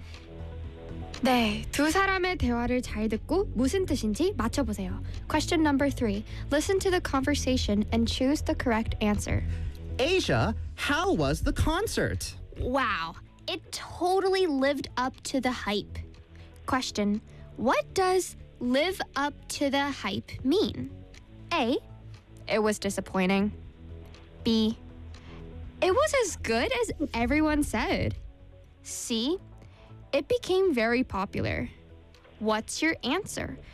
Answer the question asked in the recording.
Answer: 뭐 소문만큼 좋다 하는 뜻입니다.